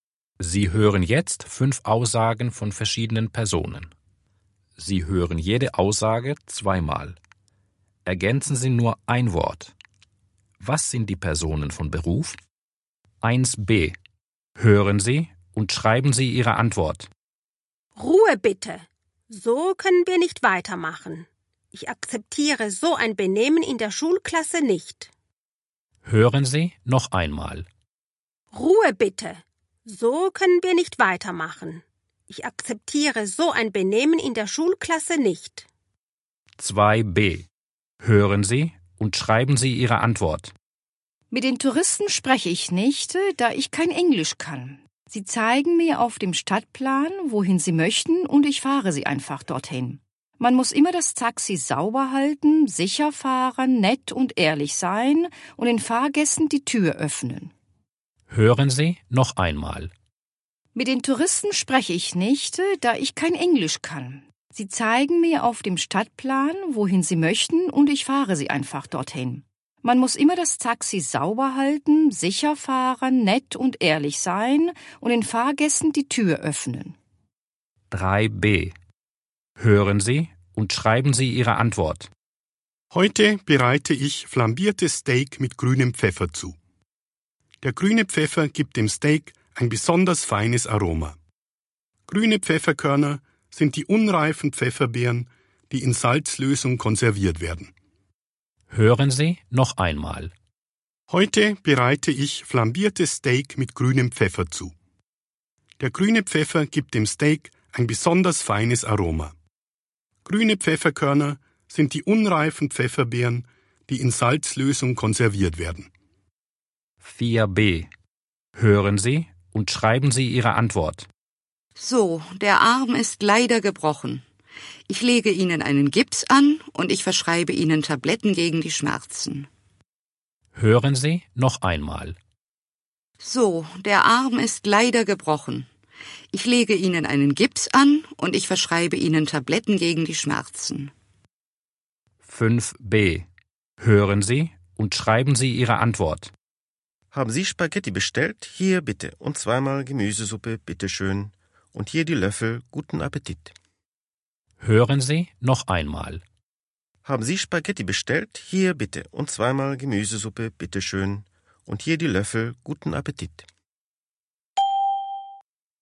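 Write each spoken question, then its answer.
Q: Was sind die Personen von Beruf?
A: Lehrer

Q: Was sind die Personen von Beruf?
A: Taxifahrer

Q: Was sind die Personen von Beruf?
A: Koch

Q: Was sind die Personen von Beruf?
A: Arzt

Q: Was sind die Personen von Beruf?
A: Kellner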